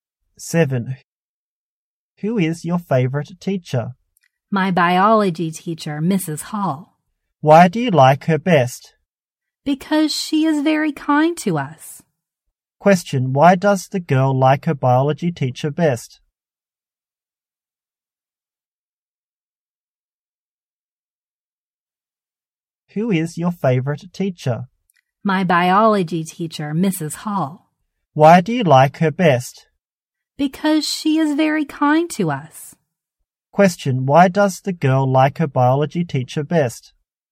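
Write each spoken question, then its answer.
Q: Question, why does the girl like her biology teacher best?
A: Because she is very kind to them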